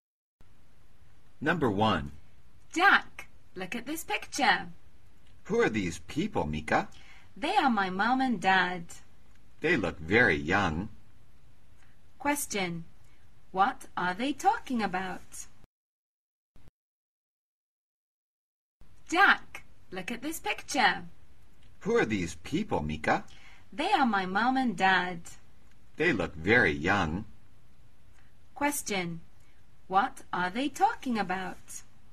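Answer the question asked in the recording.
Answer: A picture of Mika's parents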